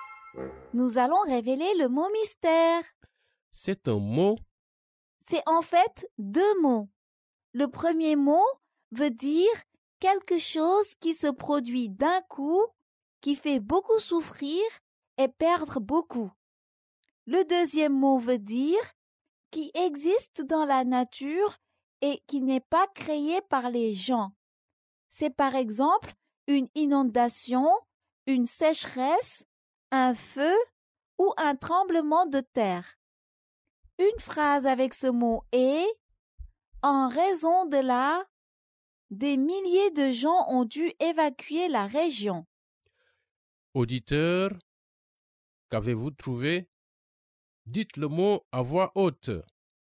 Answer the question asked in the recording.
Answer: Le mot mystère est catastrophe naturelle.